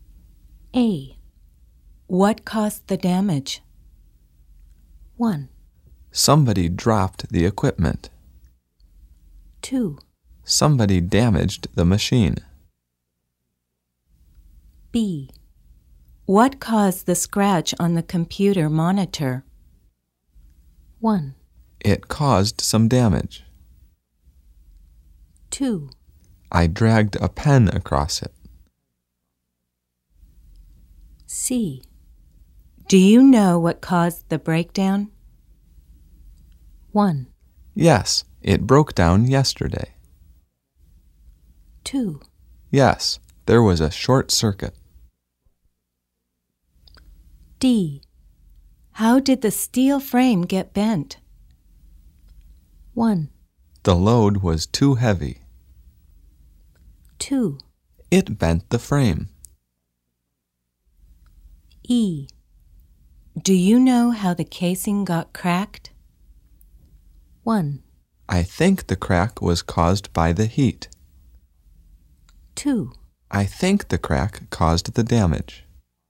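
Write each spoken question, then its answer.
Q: What caused the damage?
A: 1: Somebody dropped the equipment.

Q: What caused the scratch on the computer monitor?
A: 2: I dragged a pen across it.

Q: Do you know what caused the breakdown?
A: 2: Yes, there was a short circuit.

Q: How did the steel frame get bent?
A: 1: The load was too heavy.

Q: Do you know how the casing got cracked?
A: 1: I think the crack was caused by the heat.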